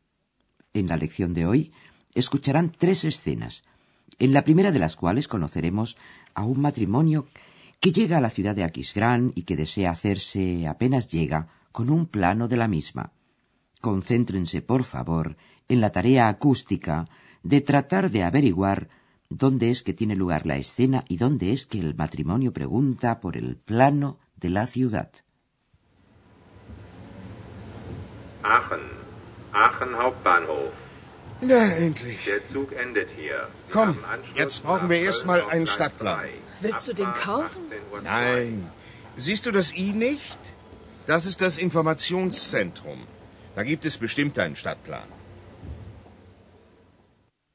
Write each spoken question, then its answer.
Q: Concéntrense, por favor, en la tarea acústica de tratar de averiguar dónde es que tiene lugar la escena y dónde es que el matrimonio pregunta por el plano de la ciudad.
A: la escena se desarrolla en la estación de tren de Aquisgrán.